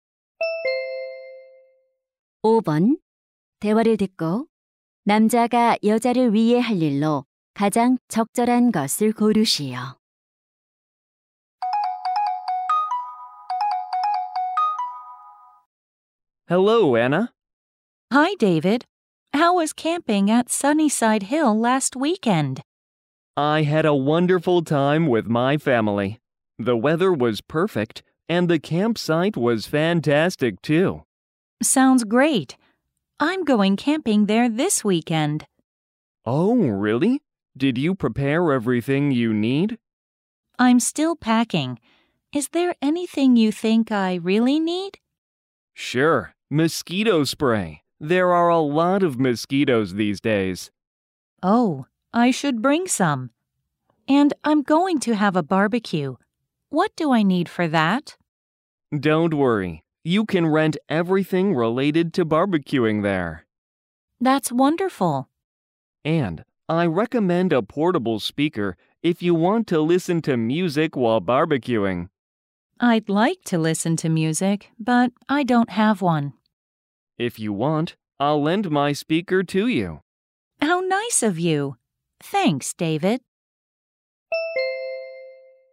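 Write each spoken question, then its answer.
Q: 대화를 듣고 남자가 여자를 위해 할 일로 가장 적절한 것을 고르시오.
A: 휴대용 스피커 빌려주기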